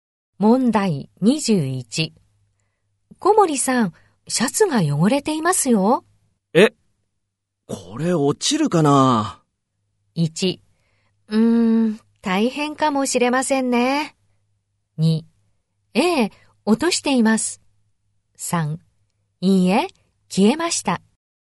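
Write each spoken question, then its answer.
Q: 小森さん、シャツが汚れていますよ。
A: 2: 大変かもしれませんね。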